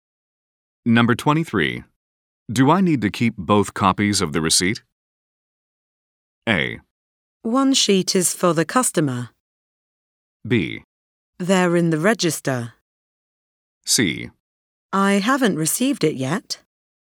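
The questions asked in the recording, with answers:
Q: Do I need to keep both copies of the receipt?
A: A: One sheet is for the customer.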